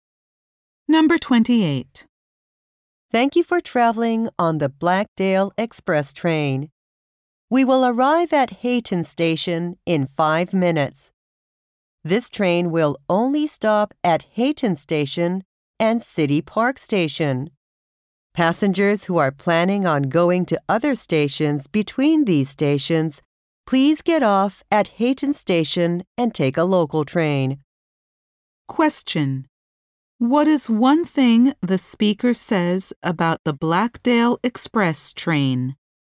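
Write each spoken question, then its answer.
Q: What is one thing the speaker says about the Blackdale Express train?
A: It only stops at Hayton Station and City Park Station.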